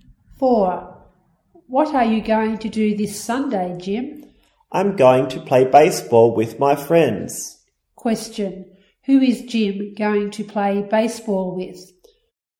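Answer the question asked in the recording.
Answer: His friends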